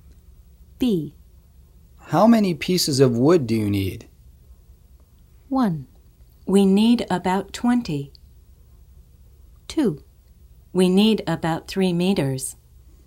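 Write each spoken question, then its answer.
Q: How many pieces of wood do you need?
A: 1: We need about 20.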